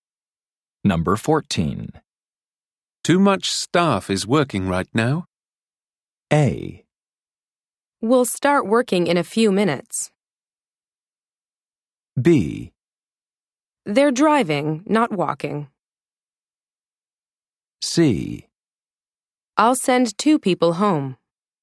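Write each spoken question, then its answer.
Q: Too much staff is working right now.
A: C: I'll send two people home.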